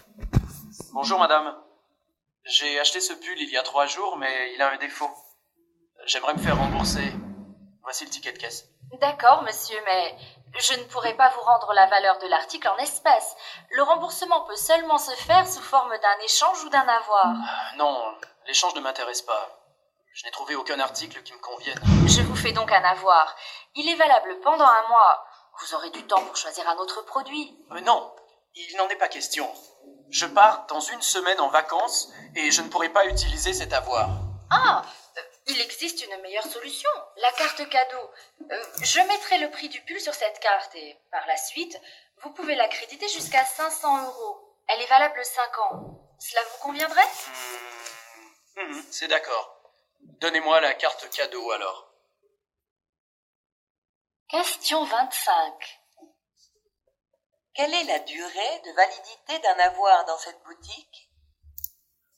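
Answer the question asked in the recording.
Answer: Un mois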